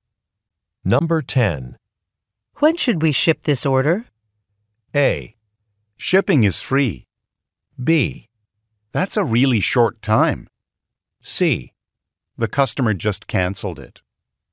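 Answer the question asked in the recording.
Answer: C: The customer just canceled it.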